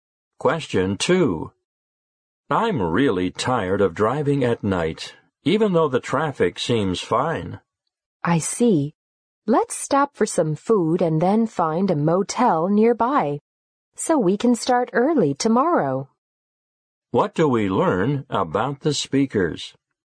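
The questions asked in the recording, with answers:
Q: What do we learn about the speakers?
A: They will stop for food and then stay at a motel nearby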